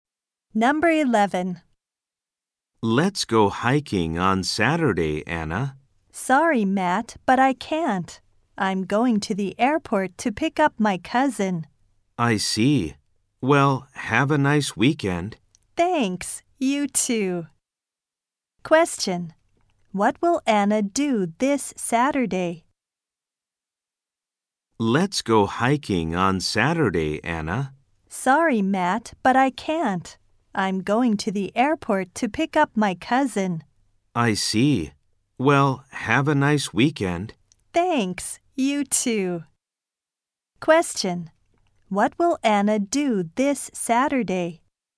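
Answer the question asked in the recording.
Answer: Pick up her cousin at the airport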